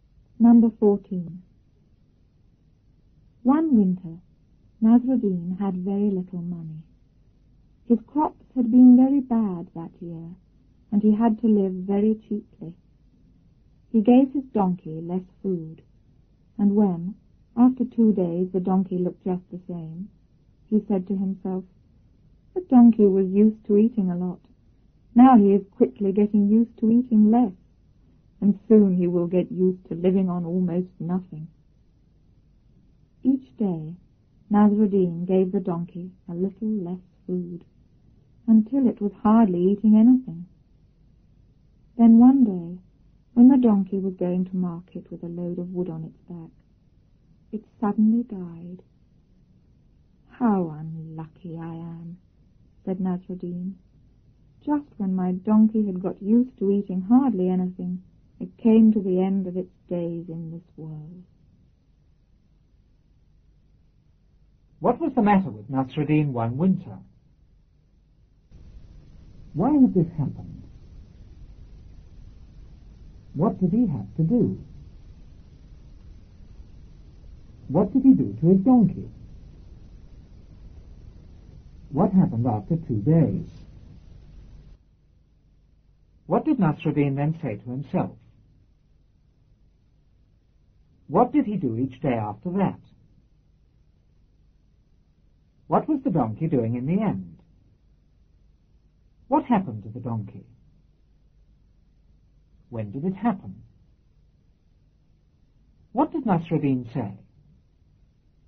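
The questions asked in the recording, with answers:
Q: What was the matter with Nasruddin one winter?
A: He had very little money.

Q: Why had this happened?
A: His crops had been very bad that year.

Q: What did he have to do?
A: He had to live very cheaply.

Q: What did he do to his donkey?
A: He gave it less food.

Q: What happened after 2 days?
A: The donkey looked just the same.

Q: What did Nasruddin then say to himself?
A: The donkey was getting used to eating less and would soon get used to living on almost nothing.

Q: What did he do each day after that?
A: He gave the donkey a little less food.

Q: What was the donkey doing in the end?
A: It was hardly eating anything.

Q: What happened to the donkey?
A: It suddenly died.

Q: When did it happen?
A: When it was going to market with a load of wood on its back.

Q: What did Nasruddin say?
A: How unlucky he was: just when the donkey had got used to eating hardly anything, it died.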